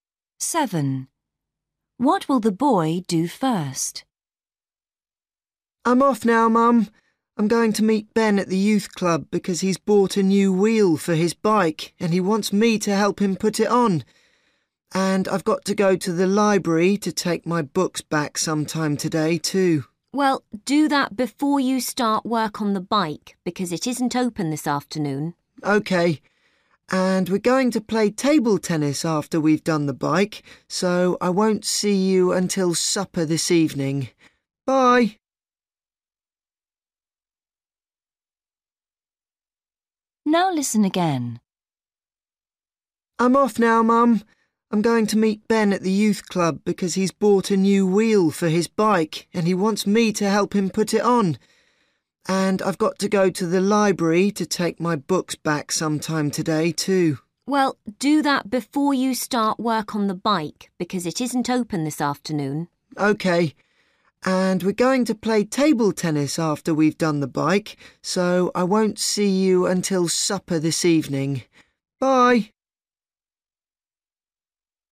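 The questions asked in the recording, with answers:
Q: What will the boy do first?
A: Take his books back to the library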